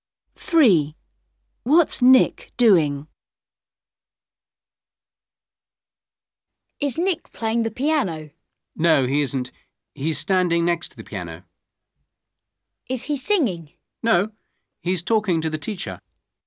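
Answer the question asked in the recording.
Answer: Talking to the teacher, standing next to the piano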